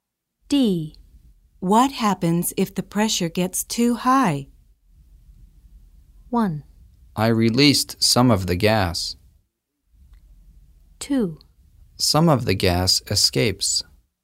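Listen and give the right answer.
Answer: 2: Some of the gas escapes.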